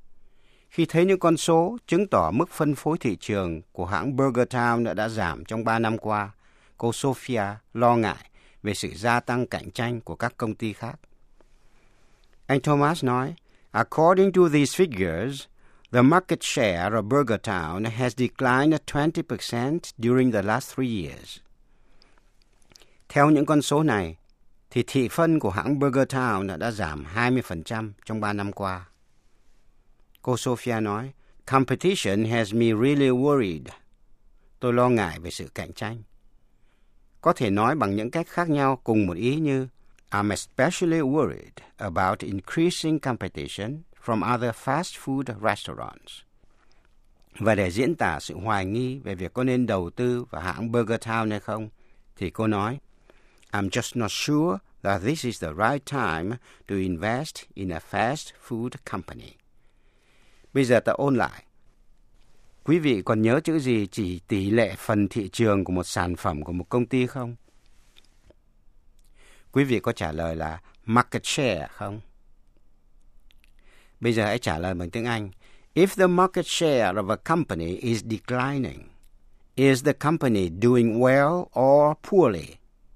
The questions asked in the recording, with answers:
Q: If the market share of a company is declining, is the company doing well or poorly?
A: Quý vị có trả lời là poorly không?